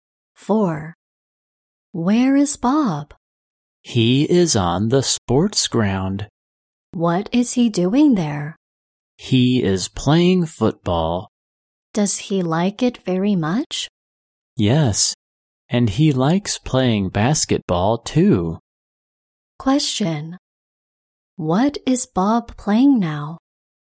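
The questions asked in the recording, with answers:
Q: What is Bob playing now?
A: Football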